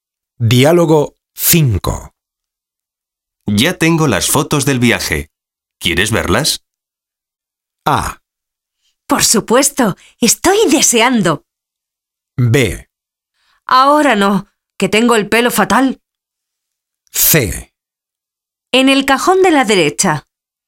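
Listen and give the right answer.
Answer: A: Por supuesto, estoy deseando.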